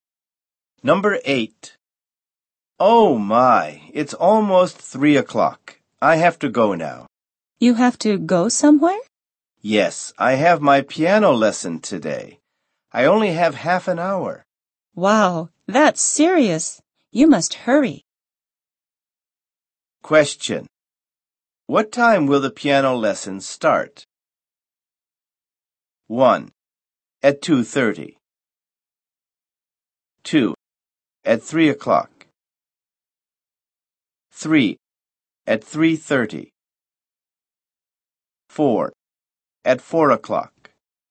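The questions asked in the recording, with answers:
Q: What time will the piano lesson start?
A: 3: At 3:30.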